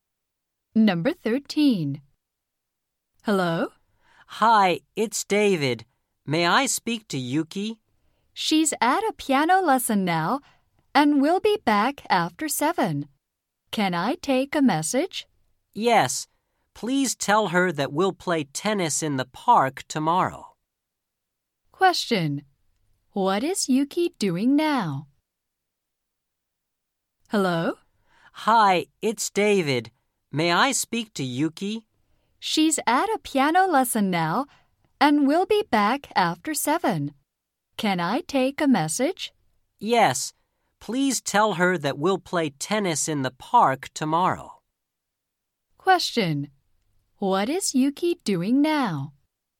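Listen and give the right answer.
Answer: She is taking a piano lesson.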